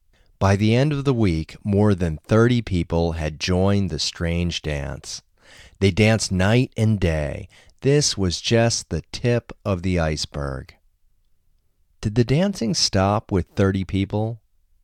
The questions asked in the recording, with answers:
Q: Did the dancing stop with 30 people?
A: No, the dancing didn't stop with 30 people.